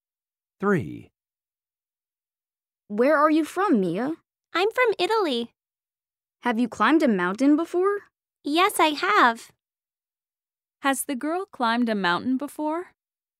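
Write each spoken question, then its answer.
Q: Has the girl climbed a mountain before?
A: Yes, she has.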